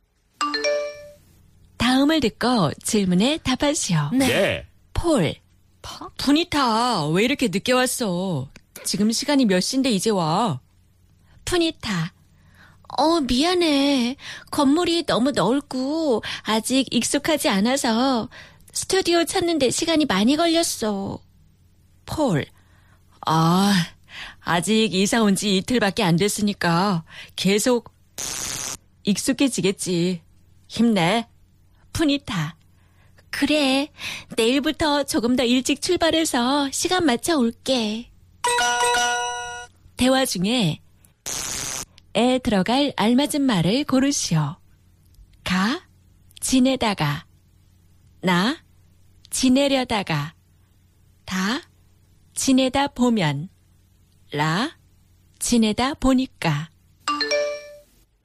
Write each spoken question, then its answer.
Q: 대화 중에 에 들어갈 알맞은 말을 고르시오.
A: 다 지내다 보면, I guess, 계속 지내다 보면 익숙하겠지, 힘내.